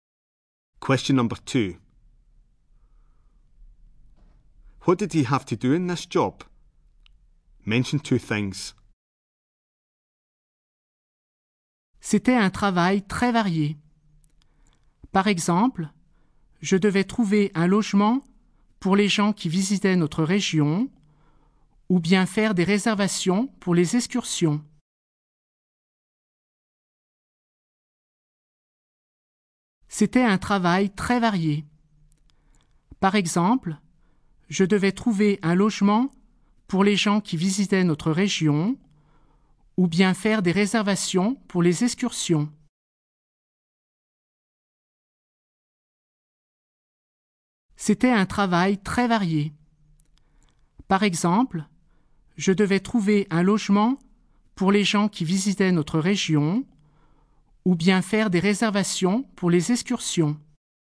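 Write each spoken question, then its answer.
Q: What did he have to do in this job? Mention two things.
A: Find accommodation for visitors; make bookings for excursions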